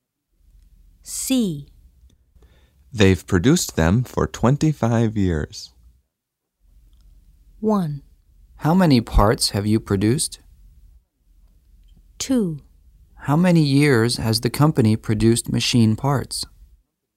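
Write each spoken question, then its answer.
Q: They've produced them for 25 years.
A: 2: How many years has the company produced machine parts?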